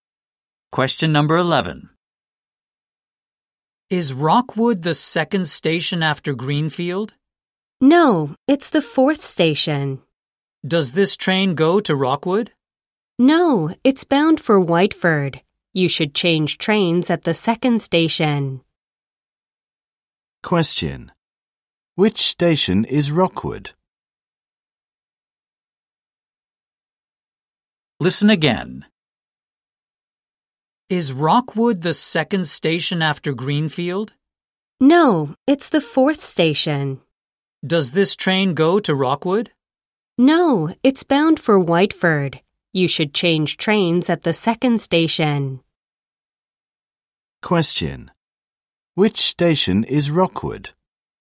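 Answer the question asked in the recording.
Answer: The fourth station after Greenfield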